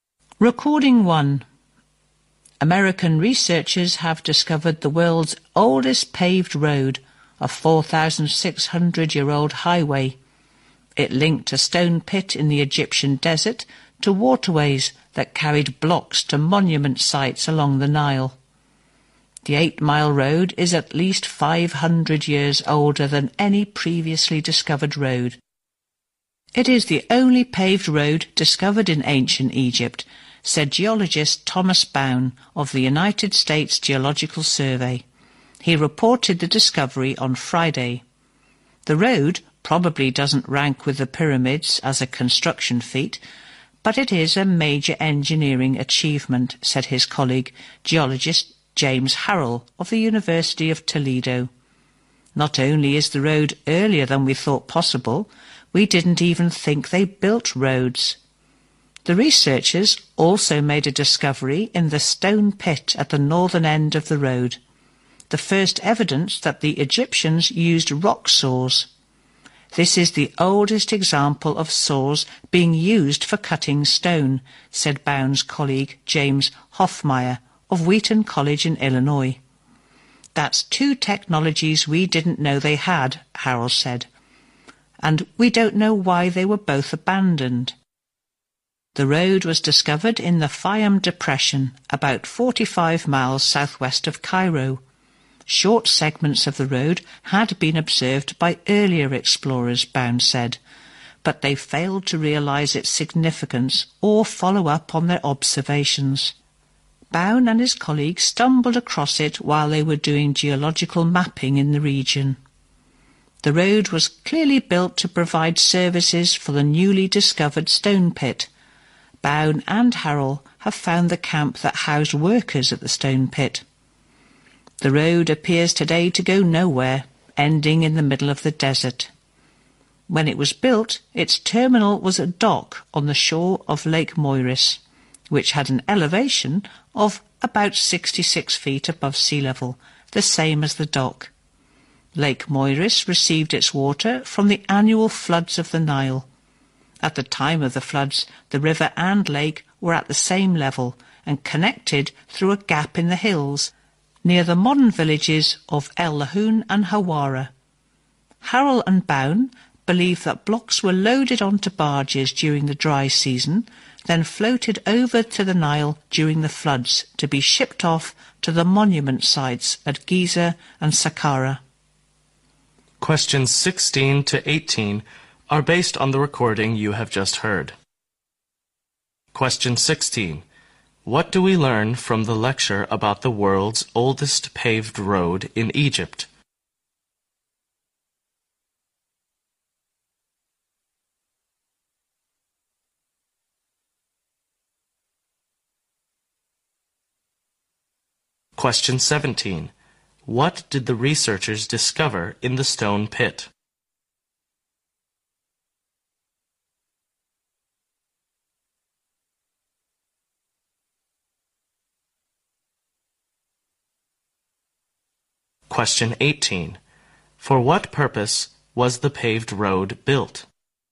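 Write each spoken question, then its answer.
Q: What did the researchers discover in the stone pit?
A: The first evidence that the Egyptians used rock saws

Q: For what purpose was the paved road built?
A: To serve the stone pit, carrying blocks to waterways to be shipped to monument sites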